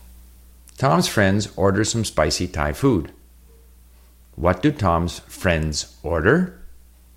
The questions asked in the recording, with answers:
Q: What do Tom's friends order?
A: They order some spicy Thai food.